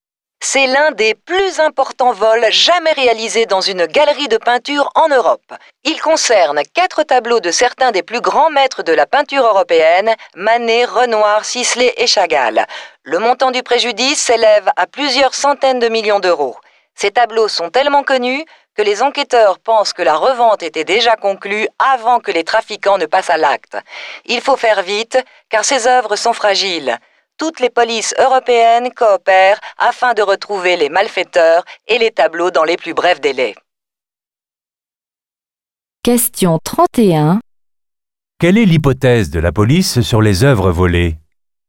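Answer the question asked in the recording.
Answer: Elles étaient déjà revendues avant le vol.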